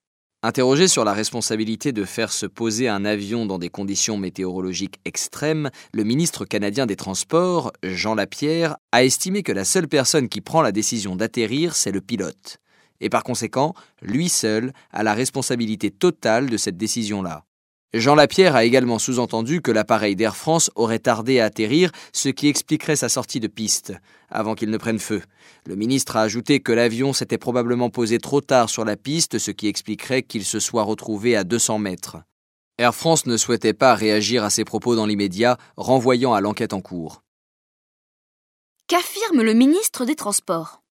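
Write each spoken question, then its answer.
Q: Qu'affirme le ministre des Transports ?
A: Que seul le pilote décide d'atterrir et porte donc l'entière responsabilité de cette décision.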